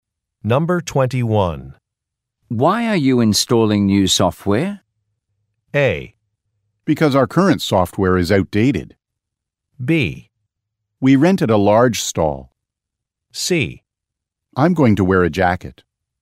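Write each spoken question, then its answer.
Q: Why are you installing new software?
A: A: Because our current software is outdated.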